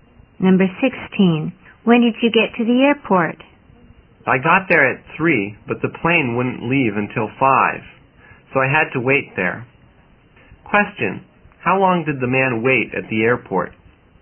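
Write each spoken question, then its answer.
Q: how long did the man wait at the airport?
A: Two hours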